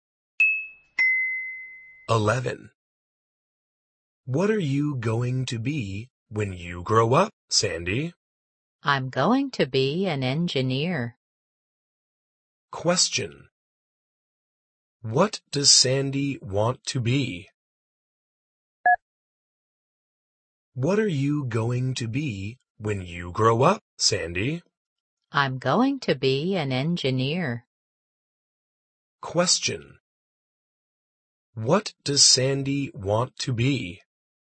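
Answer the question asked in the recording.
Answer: An engineer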